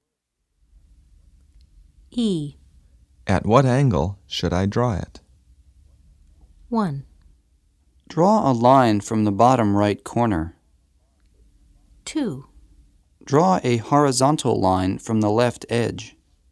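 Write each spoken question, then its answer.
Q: At what angle should I draw it?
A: 2: Draw a horizontal line from the left edge.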